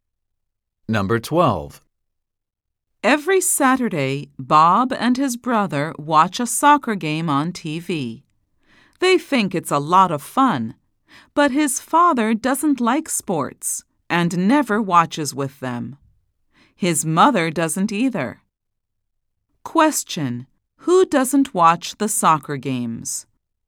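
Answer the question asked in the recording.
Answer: Bob's father and mother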